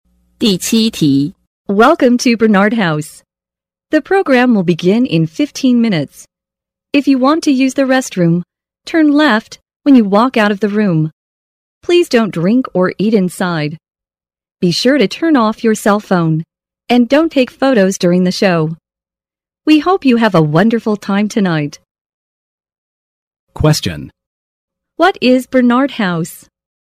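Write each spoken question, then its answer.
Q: What is Bernard House?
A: A theater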